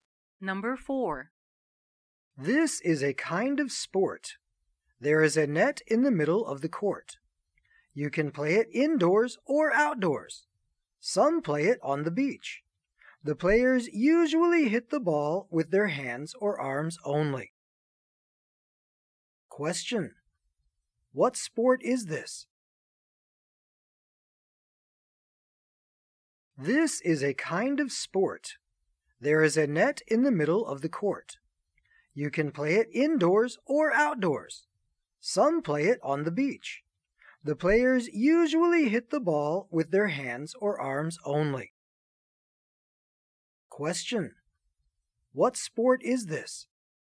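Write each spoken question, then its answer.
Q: What sport is this?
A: Volleyball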